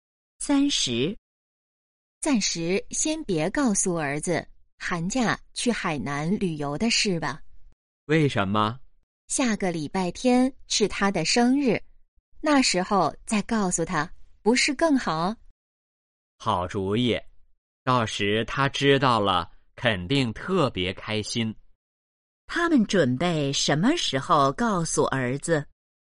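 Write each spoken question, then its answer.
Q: 他们准备什么时候告诉儿子?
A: 下个礼拜天(儿子生日时)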